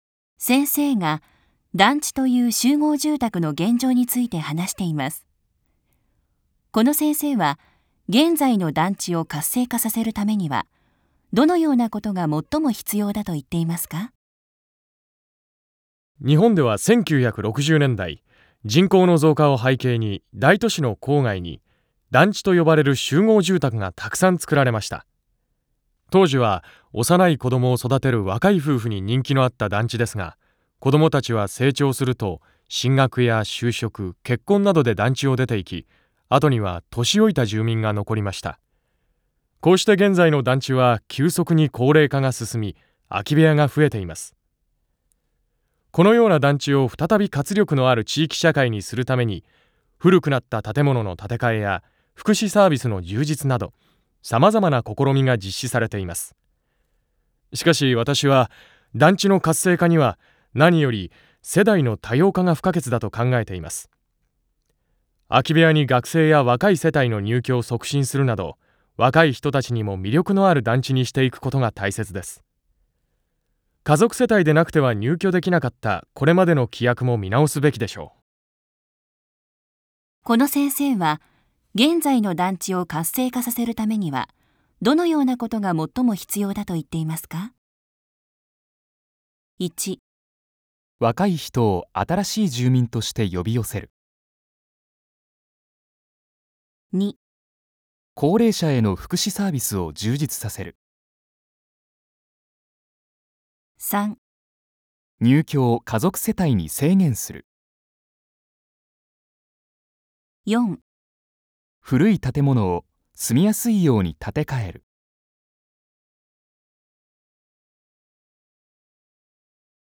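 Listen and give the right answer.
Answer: 1: 若い人を新しい住民として呼び寄せる。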